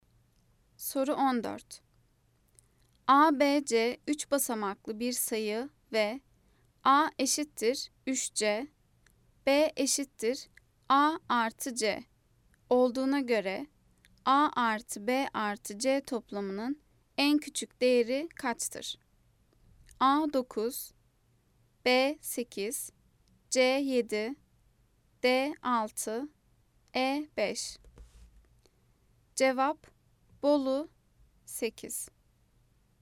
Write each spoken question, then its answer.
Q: ABC 3 basamaklı bir sayı ve A eşittir 3C, B eşittir A artı C olduğuna göre A artı B artı C toplamının en küçük değeri kaçtır?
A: Cevap Bolu 8.